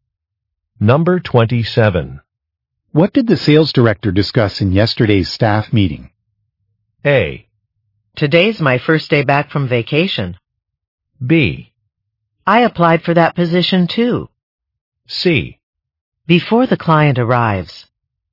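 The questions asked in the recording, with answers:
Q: What did the sales director discuss in yesterday's staff meeting?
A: A: Today's my first day back from vacation.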